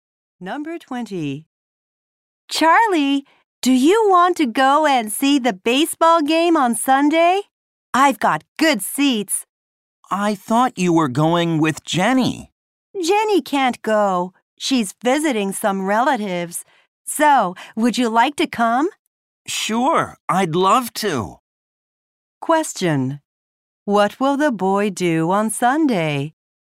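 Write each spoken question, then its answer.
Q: What will the boy do on Sunday?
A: Go to a baseball game.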